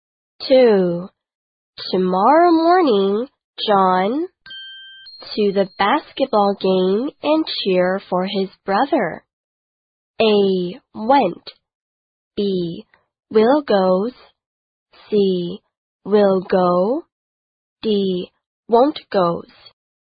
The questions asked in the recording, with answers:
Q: Tomorrow morning, John to the basketball game and cheer for his brother.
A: 没错, C 选项就是我们一直在找的正确答案啦。